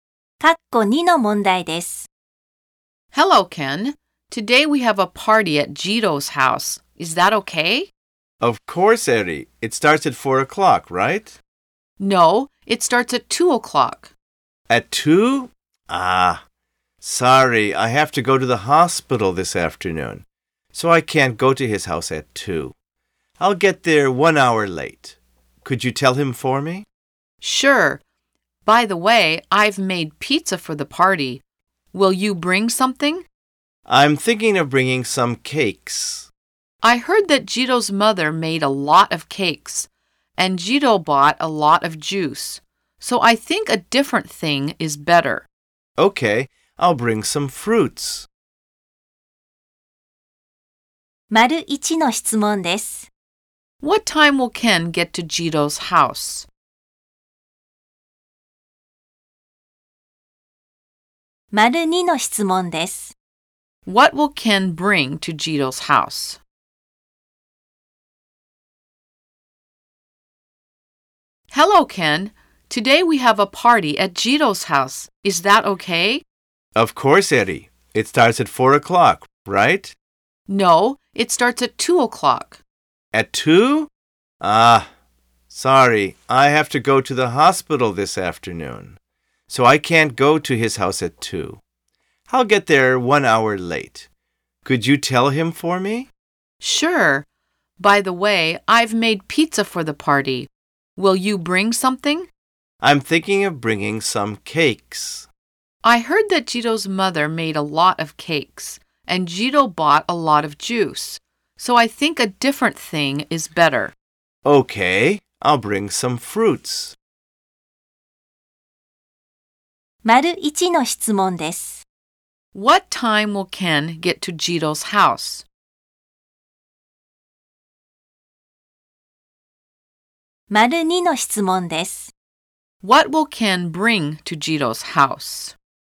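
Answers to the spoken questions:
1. At 3 o'clock
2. Some fruits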